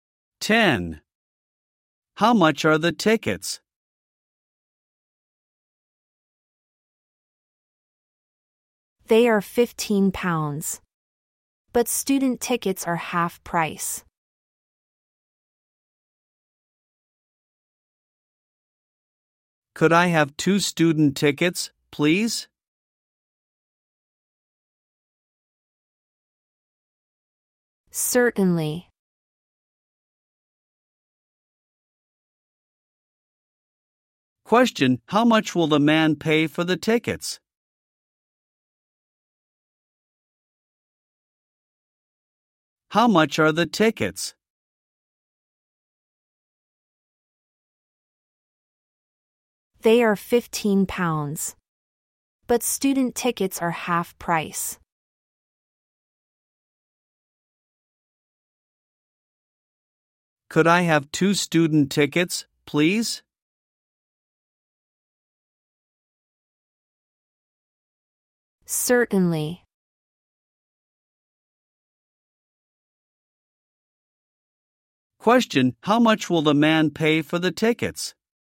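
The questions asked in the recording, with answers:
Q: how much will the man pay for the tickets?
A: £15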